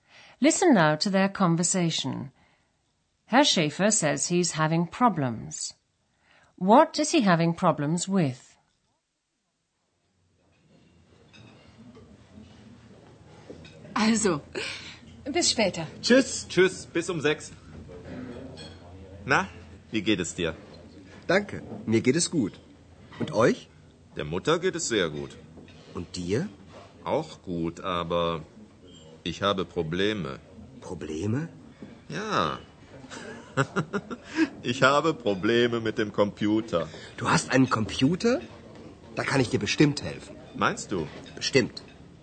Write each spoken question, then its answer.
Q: What is he having problems with?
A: Herr Schäfer says he's having problems with his computer.